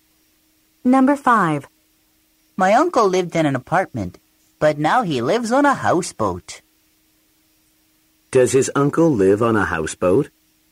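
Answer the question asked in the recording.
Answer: Yes, he does.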